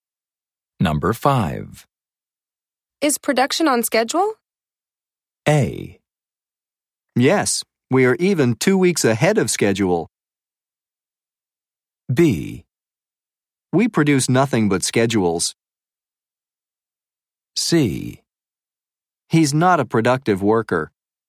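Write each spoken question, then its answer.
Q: Is production on schedule?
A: A: Yes, we are even 2 weeks ahead of schedule.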